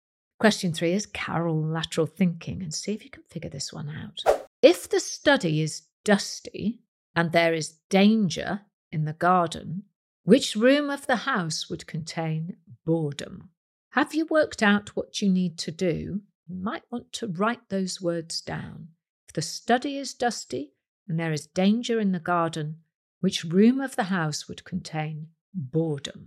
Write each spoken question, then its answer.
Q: If the study is dusty and there is danger in the garden, which room of the house would contain boredom?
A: And the answer is bedroom, as this question is all about anagrams.